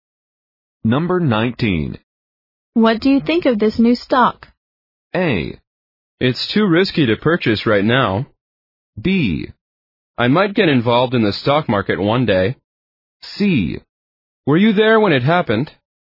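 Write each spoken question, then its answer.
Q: What do you think of this new stock?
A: A: It's too risky to purchase right now.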